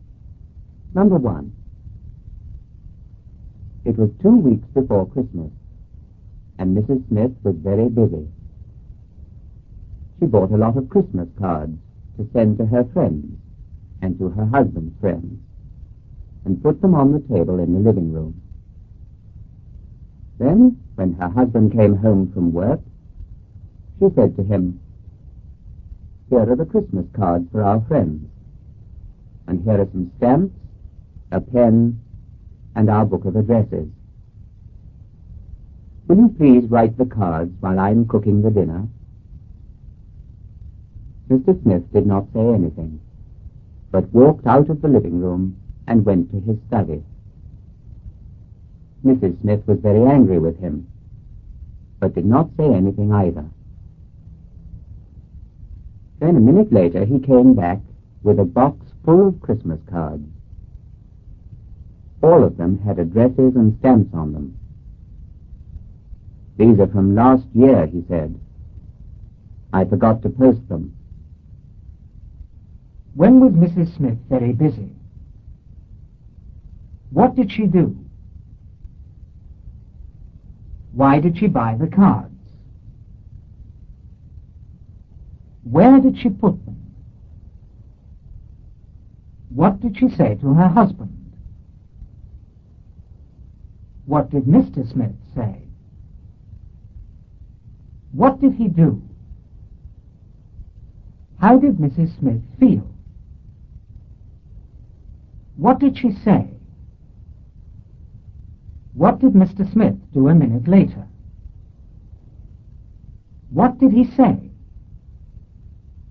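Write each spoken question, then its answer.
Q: When was Mrs. Smith very busy?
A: Two weeks before Christmas

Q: What did she do?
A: She bought a lot of Christmas cards

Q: Why did she buy the cards?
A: To send to her friends and her husband's friends

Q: Where did she put them?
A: On the table in the living room

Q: What did she say to her husband?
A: Will you please write the cards while I'm cooking the dinner?

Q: What did Mr. Smith say?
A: He did not say anything

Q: What did he do?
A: He walked out of the living room and went to his study

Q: How did Mrs. Smith feel?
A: Very angry

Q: What did she say?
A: She did not say anything

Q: What did Mr. Smith do a minute later?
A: He came back with a box full of last year's Christmas cards

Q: What did he say?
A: These are from last year. I forgot to post them.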